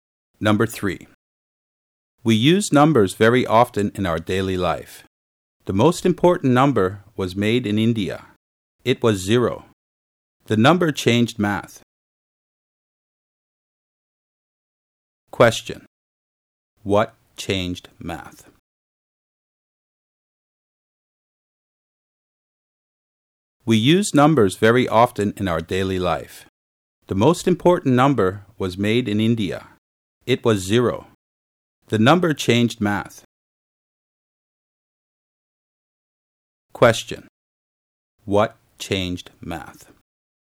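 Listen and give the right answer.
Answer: Zero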